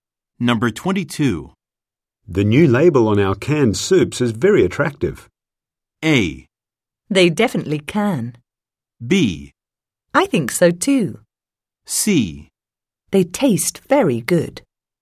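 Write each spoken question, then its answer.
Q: The new label on our canned soups is very attractive.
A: B: I think so too.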